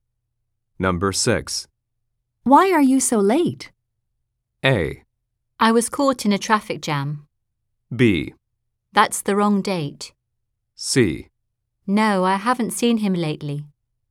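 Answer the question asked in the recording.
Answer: A: I was caught in a traffic jam.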